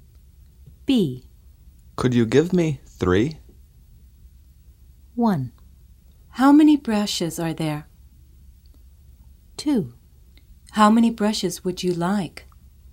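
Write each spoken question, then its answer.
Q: Could you give me 3?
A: 2: How many brushes would you like?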